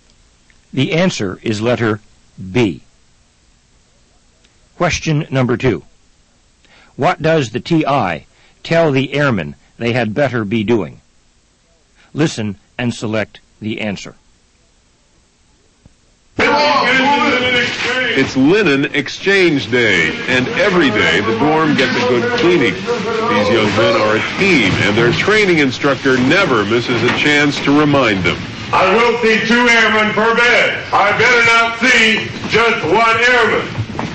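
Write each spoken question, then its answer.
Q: What does the TI tell the airmen they had better be doing?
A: Working with a buddy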